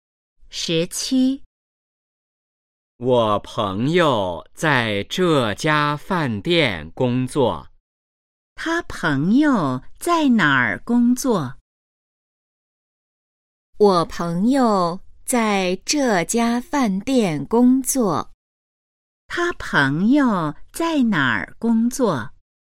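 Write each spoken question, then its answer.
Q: 他朋友在哪儿工作?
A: 饭店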